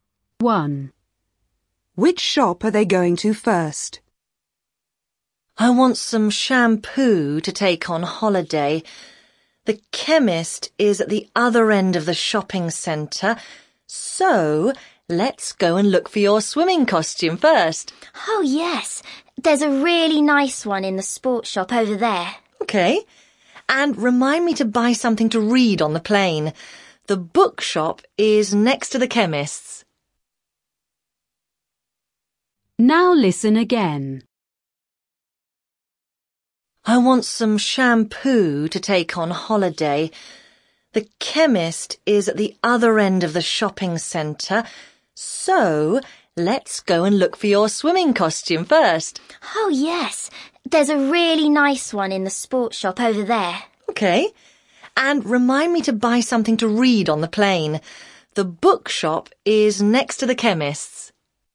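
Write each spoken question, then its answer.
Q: Which shop are they going to first?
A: The sports shop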